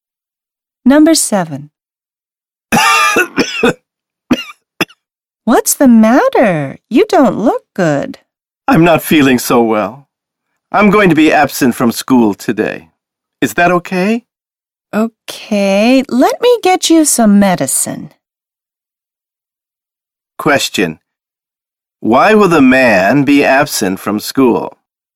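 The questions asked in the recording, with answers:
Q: Why will the man be absent from school?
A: He is not feeling well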